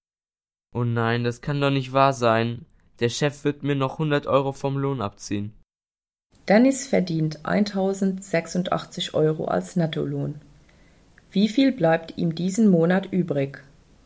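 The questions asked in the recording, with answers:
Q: Wie viel bleibt ihm diesen Monat übrig?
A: 986 Euro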